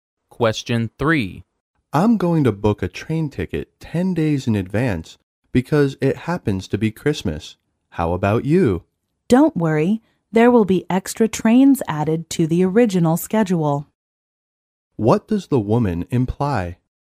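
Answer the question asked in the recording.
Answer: There is no need to book the ticket so early, because extra trains will be added.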